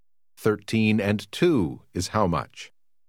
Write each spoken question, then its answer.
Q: 13 and 2 is how much?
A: 15.